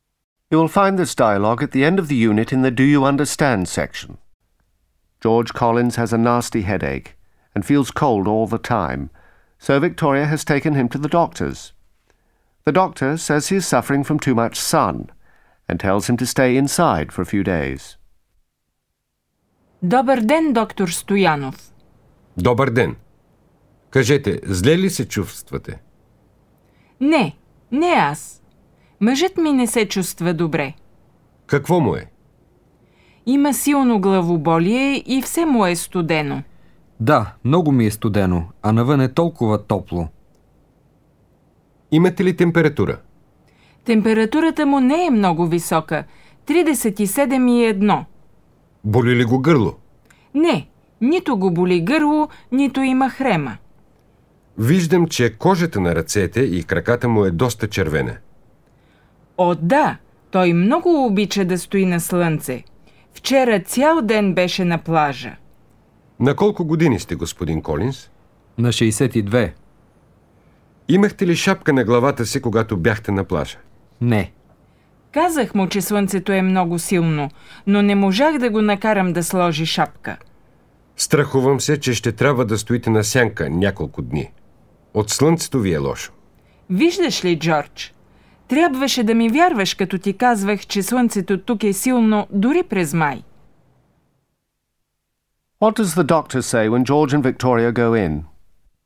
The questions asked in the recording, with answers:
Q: What does the doctor say when George and Victoria go in?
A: Добър ден. Кажете, зле ли се чувствате?